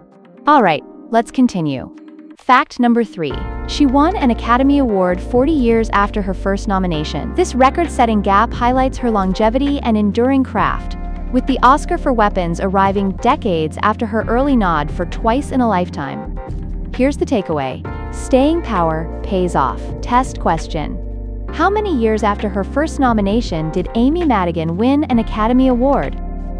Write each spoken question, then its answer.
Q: How many years after her first nomination did Amy Madigan win an Academy Award?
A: Correct answer, 40 years.